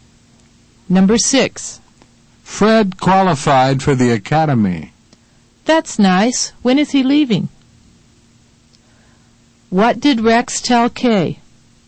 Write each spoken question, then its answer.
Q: What did Rex tell Kay?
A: He told her that Fred had qualified for the academy.